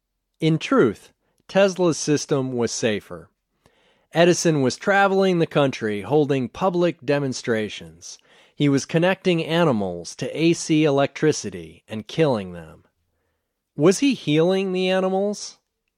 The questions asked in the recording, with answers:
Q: Was he healing the animals?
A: No, he wasn't healing the animals.